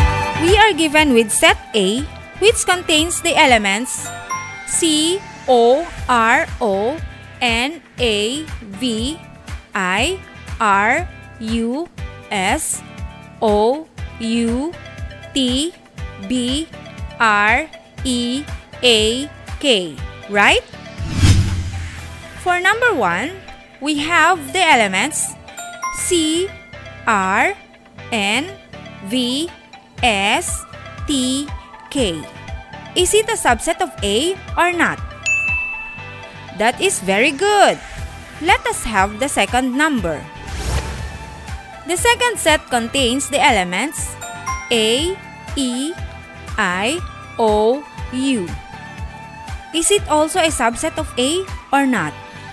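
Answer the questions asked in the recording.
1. Yes, it is a subset of A
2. Yes, it is a subset of A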